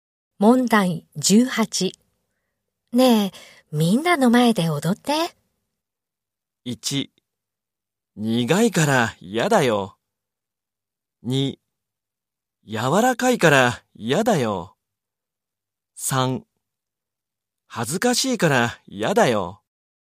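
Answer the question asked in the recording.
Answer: 3: 恥ずかしいから嫌だよ。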